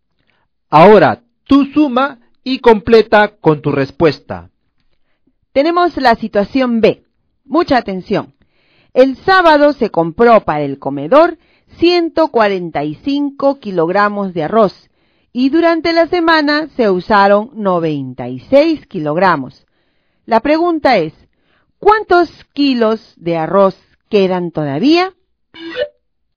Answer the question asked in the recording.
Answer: La letra B tiene como respuesta 49 kilogramos.